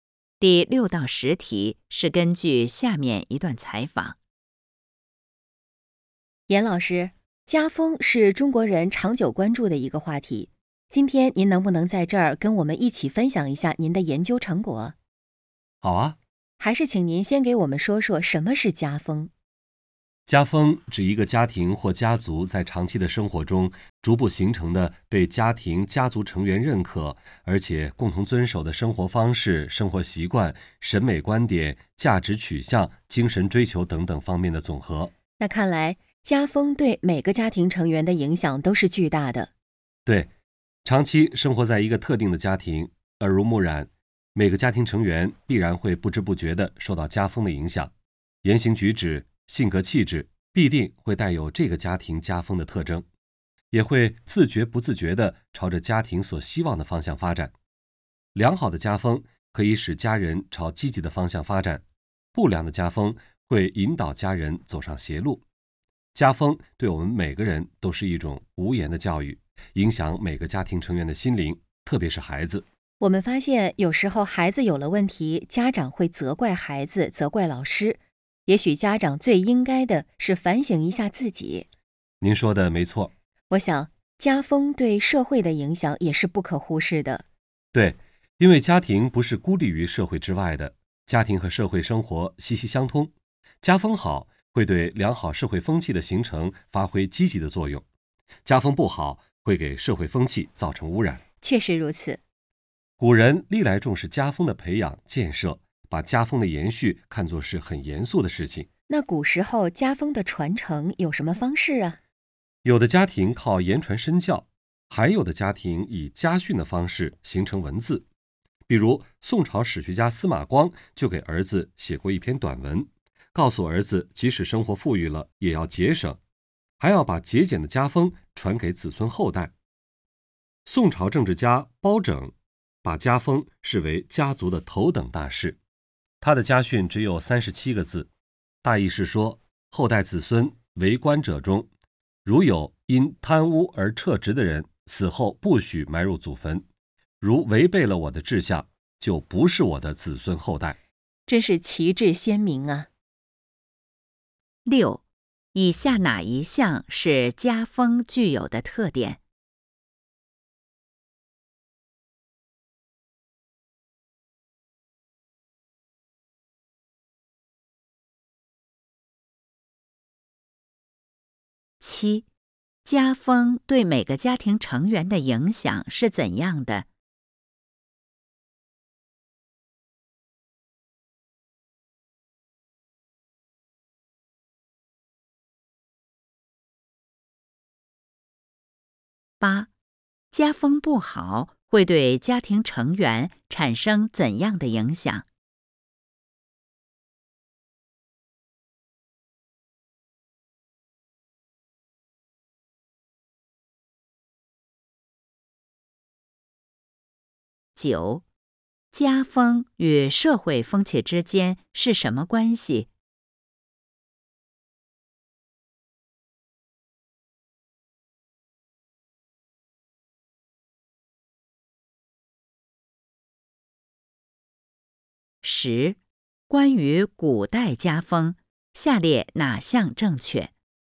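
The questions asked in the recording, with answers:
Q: 家风对每个家庭成员的影响是怎样的?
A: 影响巨大,成员会不知不觉地受到家风的影响

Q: 家风不好会对家庭成员产生怎样的影响?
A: 会引导家人走上邪路

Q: 家风与社会风气之间是什么关系?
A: 息息相通:家风好促进良好社会风气形成,家风不好会污染社会风气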